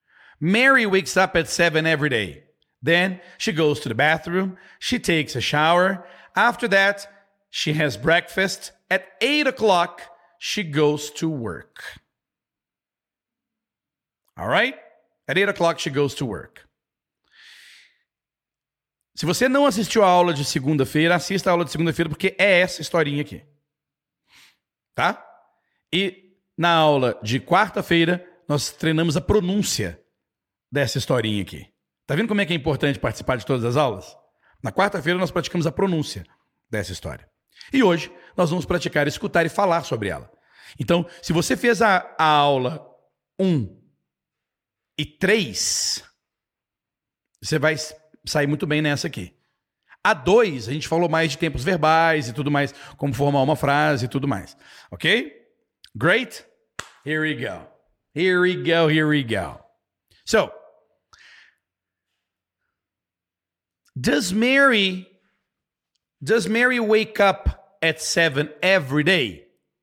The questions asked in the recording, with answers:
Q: Does Mary Does Mary wake up at 7 every day?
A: Tudo que você precisava lá é yes.